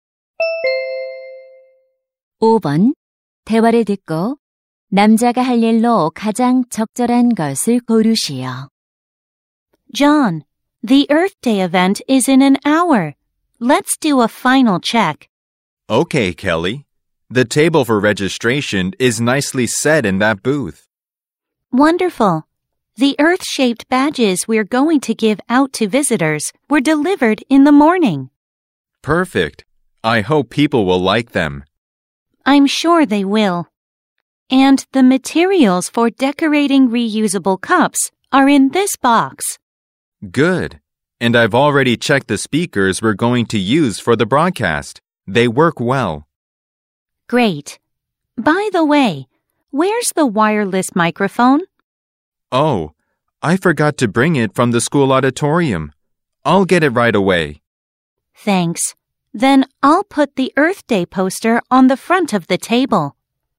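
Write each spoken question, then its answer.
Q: 대화를 듣고 남자가 할 일로 가장 적절한 것을 고르시오.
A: 무선 마이크 가져오기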